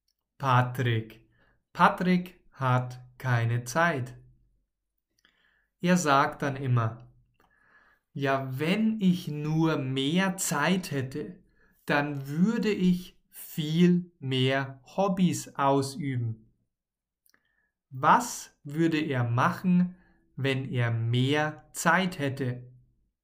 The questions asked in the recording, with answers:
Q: Was würde er machen, wenn er mehr Zeit hätte?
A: Viel mehr Hobbys ausüben.